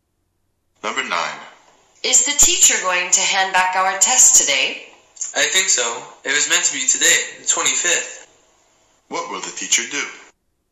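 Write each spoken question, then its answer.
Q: What will the teacher do?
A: Hand back the tests today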